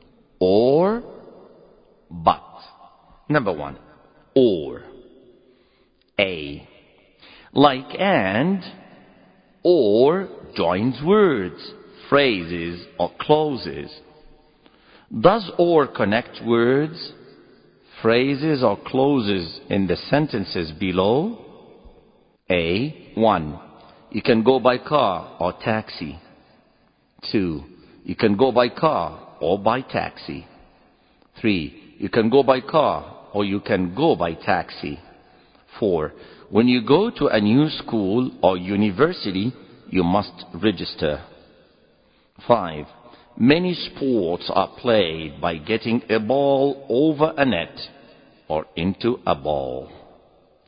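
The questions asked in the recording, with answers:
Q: You can go by car or taxi.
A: words

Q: You can go by car or by taxi.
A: phrases

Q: You can go by car or you can go by taxi.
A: clauses

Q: When you go to a new school or university, you must register.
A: words

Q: Many sports are played by getting a ball over a net or into a ball.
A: phrases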